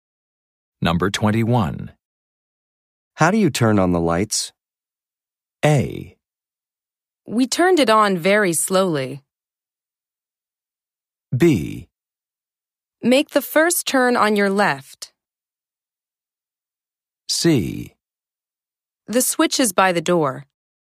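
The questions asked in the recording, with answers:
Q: How do you turn on the lights?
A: C: The switch is by the door.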